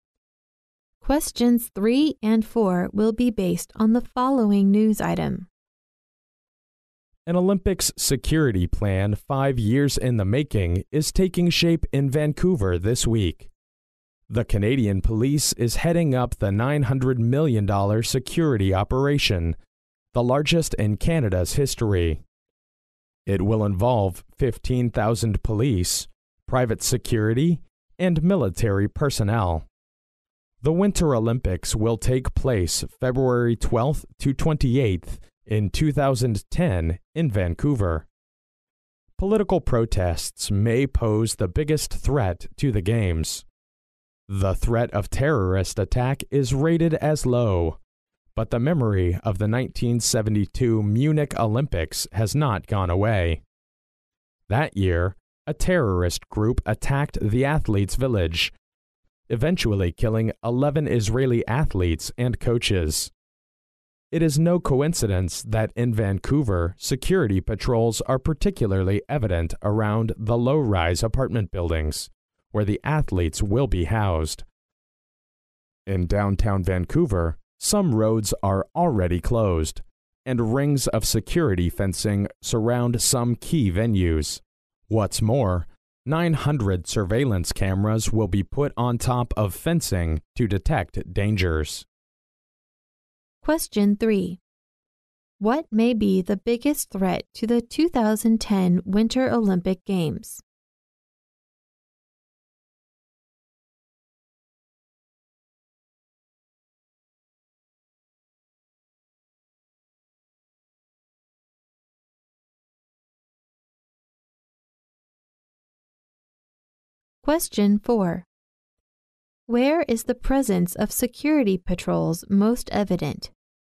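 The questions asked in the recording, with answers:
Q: What may be the biggest threat to the 2010 Winter Olympic Games?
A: Political protests

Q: Where is the presence of security patrols most evident?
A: Around the low-rise apartment buildings where the athletes will be housed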